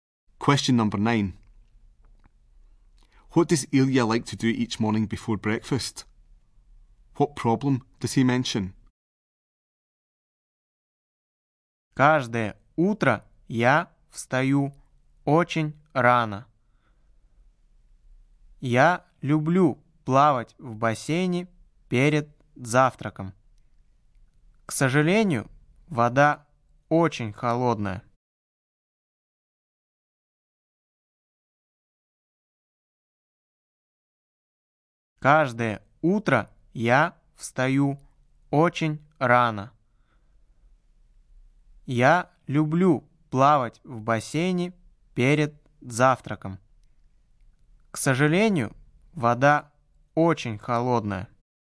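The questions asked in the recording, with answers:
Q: What does Ilya like to do each morning before breakfast?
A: Swim in the pool

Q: What problem does he mention?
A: The water is very cold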